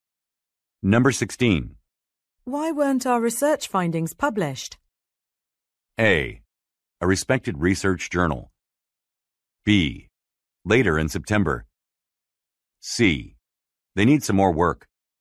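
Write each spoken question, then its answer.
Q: Why weren't our research findings published?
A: C: They need some more work.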